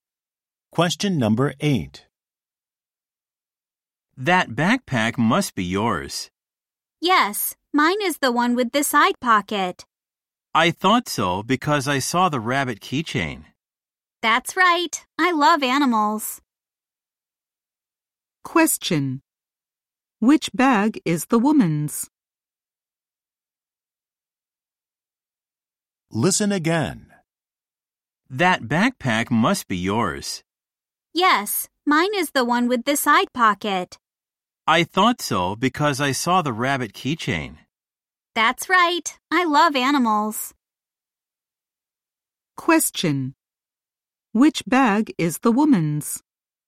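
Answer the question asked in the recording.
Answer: The backpack with the side pocket and the rabbit keychain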